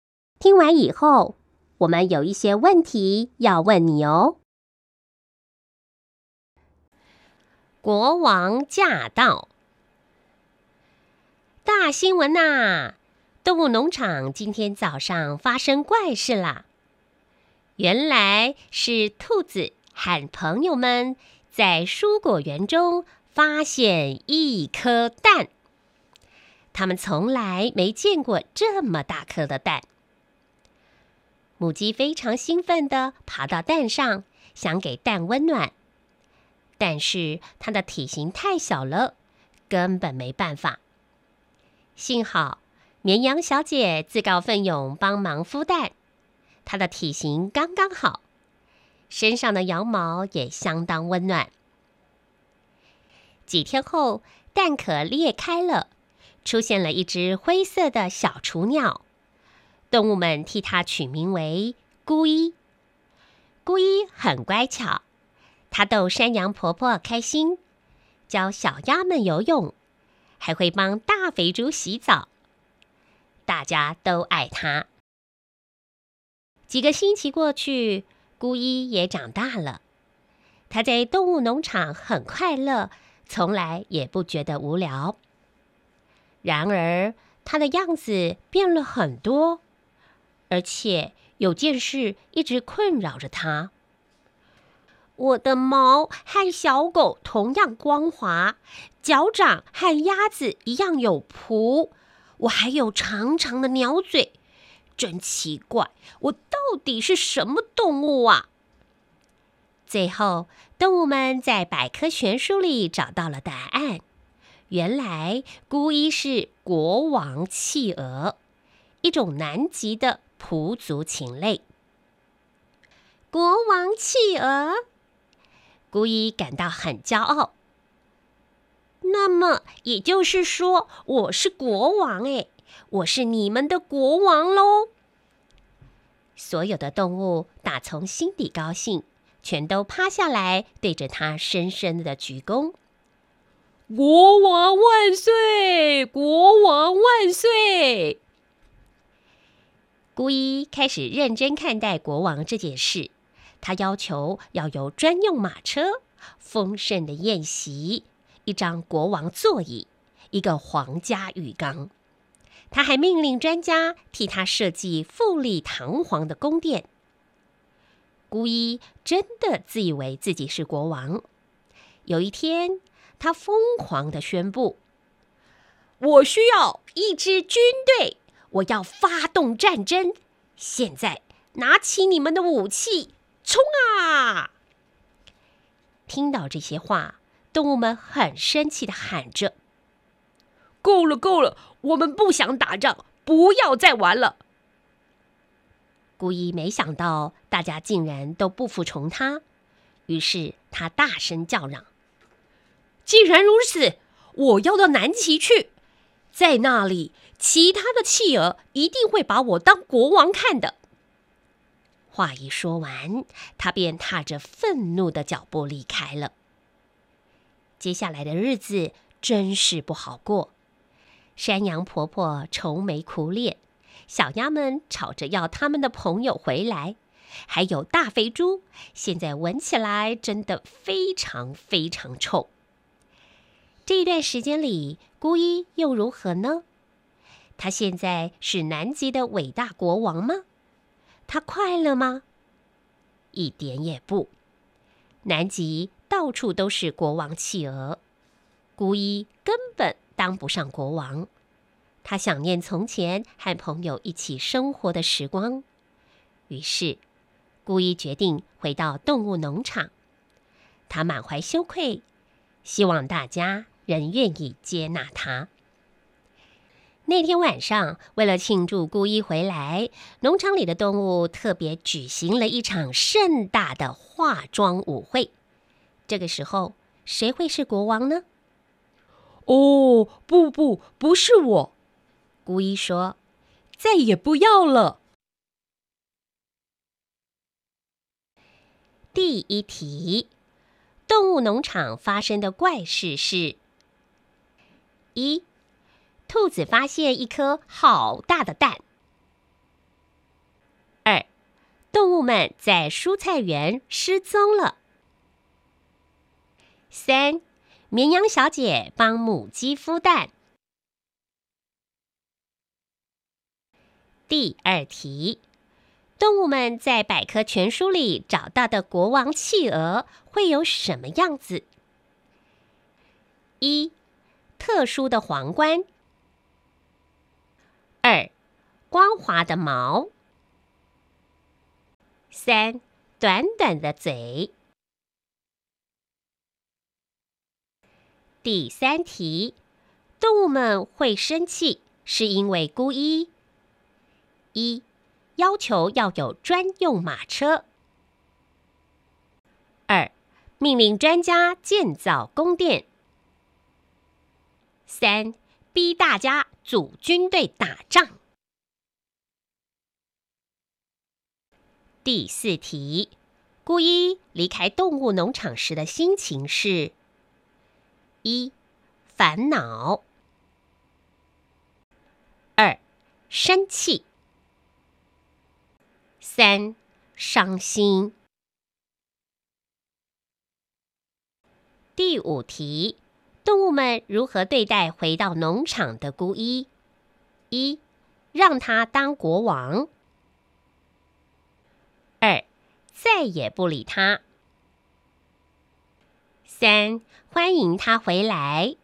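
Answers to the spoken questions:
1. 一: 兔子发现一颗好大的蛋
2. 二: 光滑的毛
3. 三: 逼大家组军队打仗
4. 二: 生气
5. 三: 欢迎他回来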